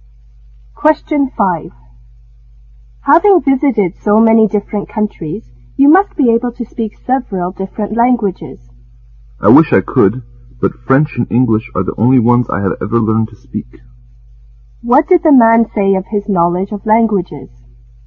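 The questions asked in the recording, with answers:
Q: What did the man say of his knowledge of languages?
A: He can only speak French and English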